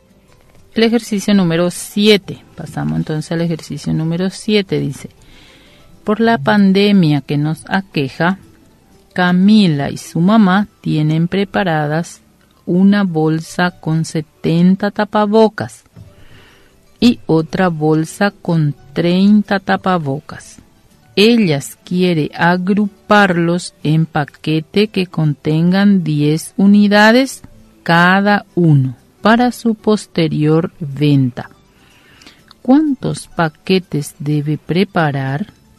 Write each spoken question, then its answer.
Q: ¿Cuántos paquetes debe preparar?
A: Debe preparar 10 paquetes.